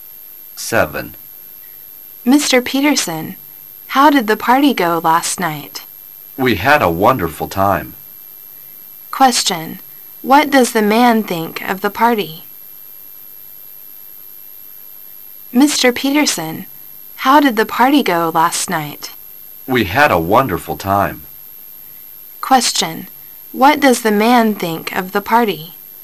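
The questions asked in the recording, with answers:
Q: What does the man think of the party?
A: It was wonderful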